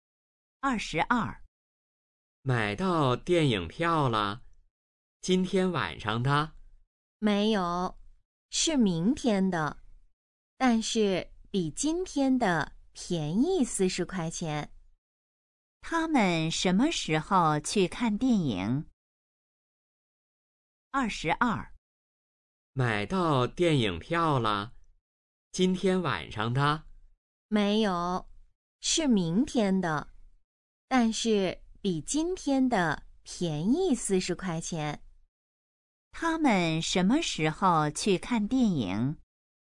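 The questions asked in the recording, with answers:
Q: 他们什么时候去看电影?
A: 明天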